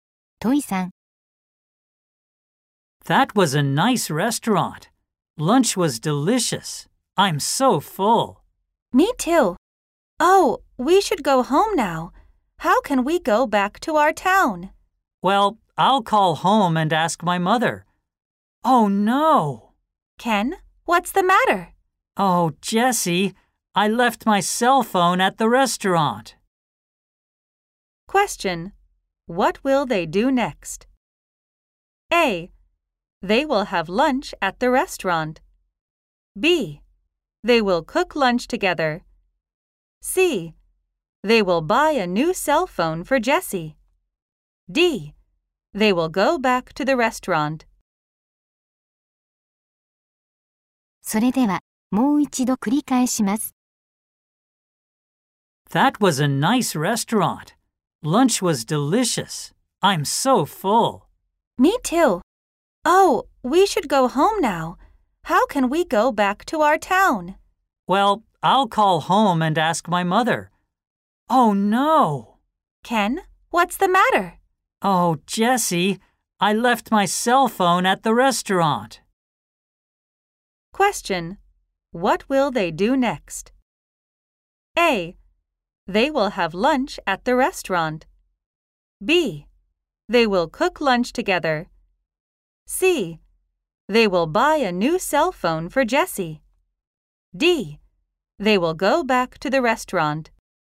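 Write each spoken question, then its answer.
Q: What will they do next?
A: D: They will go back to the restaurant.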